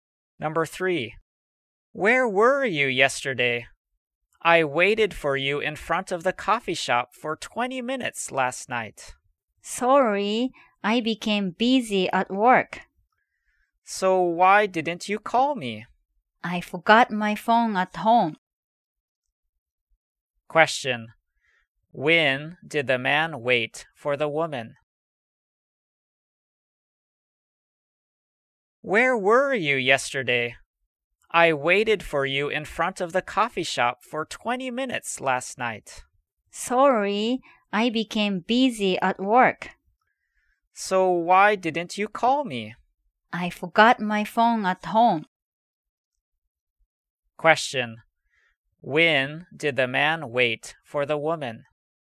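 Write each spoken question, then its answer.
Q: When did the man wait for the woman?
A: Last night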